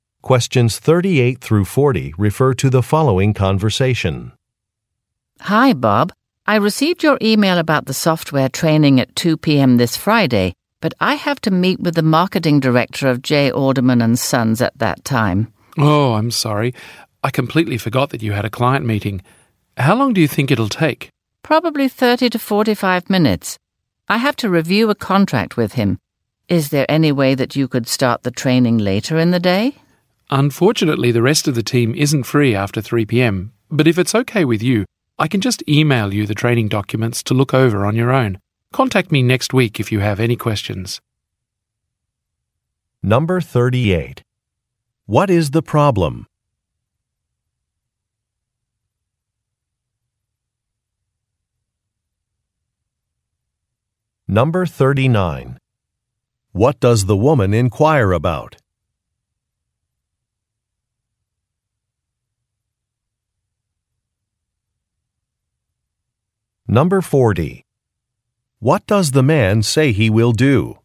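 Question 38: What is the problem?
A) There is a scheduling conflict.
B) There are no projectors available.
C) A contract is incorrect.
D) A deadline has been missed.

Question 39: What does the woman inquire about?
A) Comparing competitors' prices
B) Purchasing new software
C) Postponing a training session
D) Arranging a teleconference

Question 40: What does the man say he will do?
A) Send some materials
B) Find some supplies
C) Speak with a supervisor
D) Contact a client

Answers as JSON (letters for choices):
{"38": "A", "39": "C", "40": "A"}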